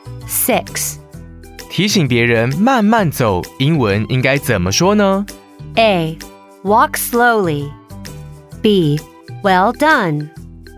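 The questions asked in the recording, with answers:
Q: 提醒别人慢慢走,英文应该怎么说呢?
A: A: Walk slowly.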